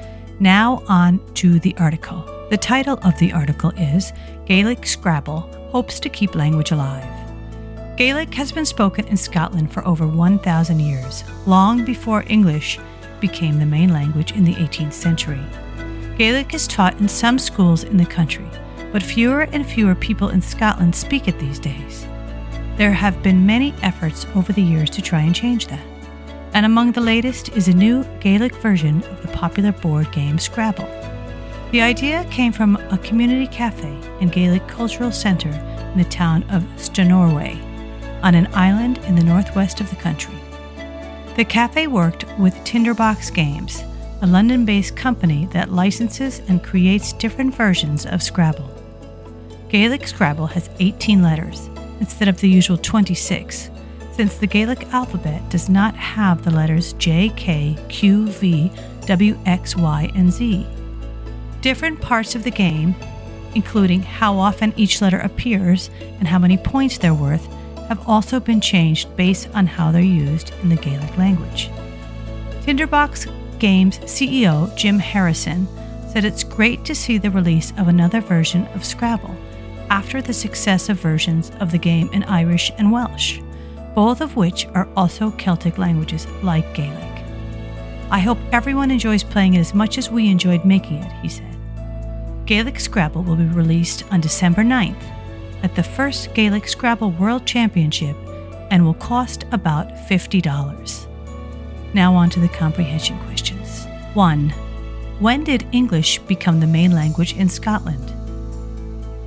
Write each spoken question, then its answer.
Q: When did English become the main language in Scotland?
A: Answer 18th century.